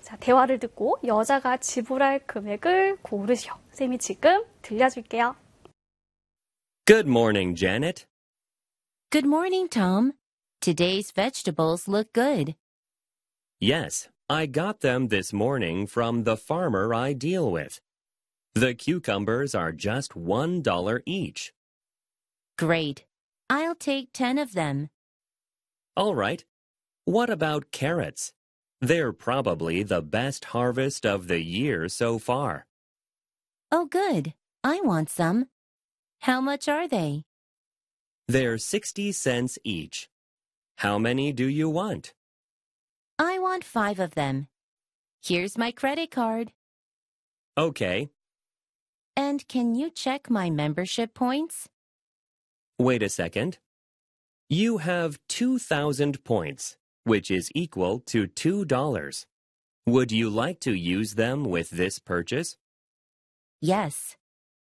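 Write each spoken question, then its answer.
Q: 대화를 듣고 여자가 지불할 금액을 고르시오.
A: 11달러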